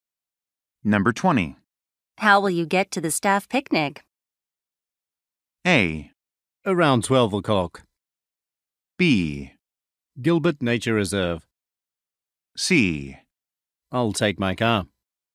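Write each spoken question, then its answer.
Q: How will you get to the staff picnic?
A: C: I'll take my car.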